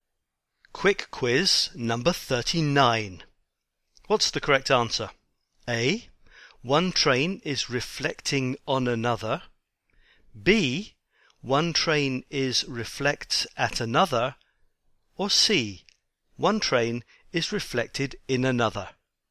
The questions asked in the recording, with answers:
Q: What's the correct answer?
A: And the correct answer is C.